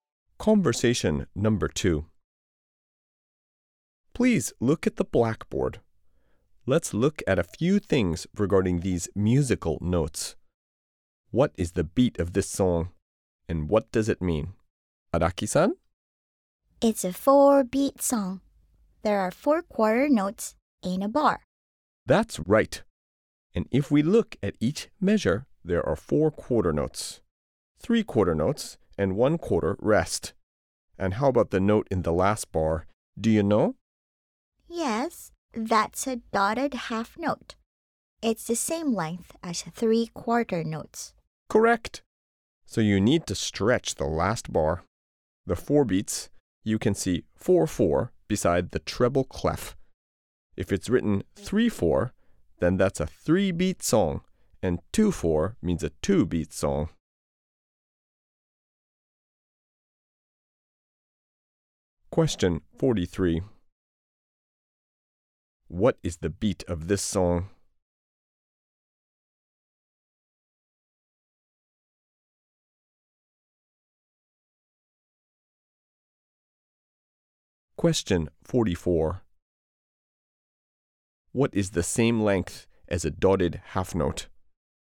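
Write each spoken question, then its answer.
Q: What is the beat of this song?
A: It's a 4-beat song (4-4).

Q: What is the same length as a dotted half note?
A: 3 quarter notes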